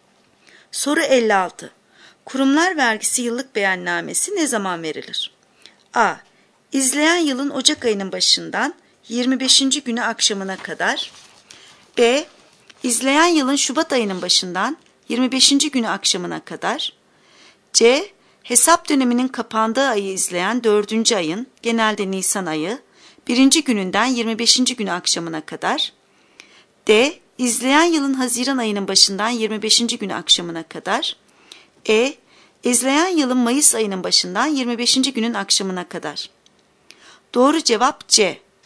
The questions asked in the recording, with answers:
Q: Kurumlar vergisi yıllık beyannamesi ne zaman verilir?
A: Doğru cevap C.